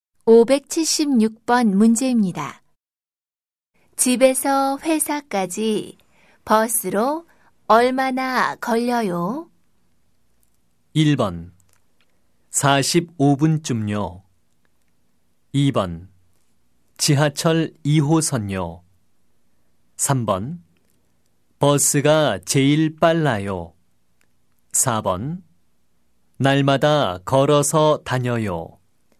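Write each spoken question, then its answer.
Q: 집에서 회사까지 버스로 얼마나 걸려요?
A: 1: 45분쯤요.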